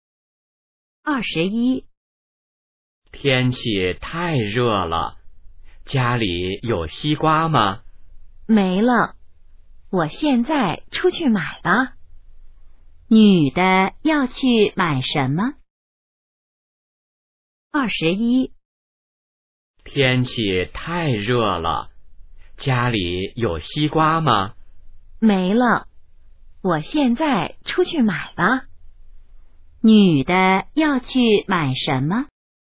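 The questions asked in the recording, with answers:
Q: 女的要去买什么?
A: 西瓜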